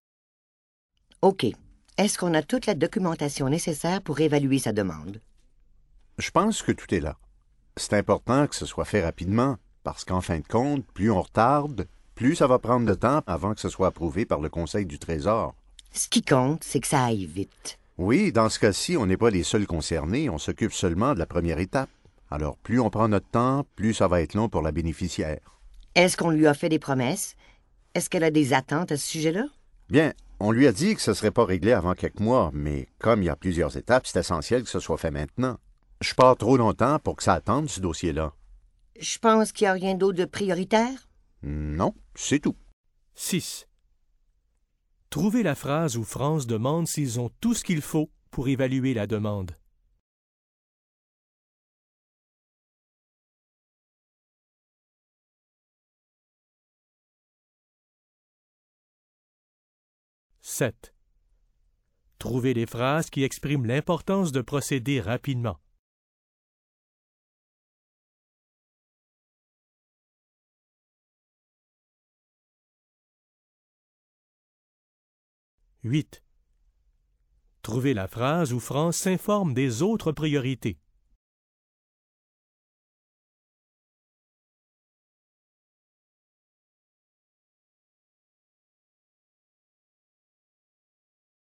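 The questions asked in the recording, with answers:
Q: Trouvez la phrase où France demande s'ils ont tout ce qu'il faut pour évaluer la demande.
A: Est-ce qu'on a toute la documentation nécessaire pour évaluer sa demande?

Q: Trouvez la phrase où France s'informe des autres priorités.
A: Je pense qu'il n'y a rien d'autre de prioritaire?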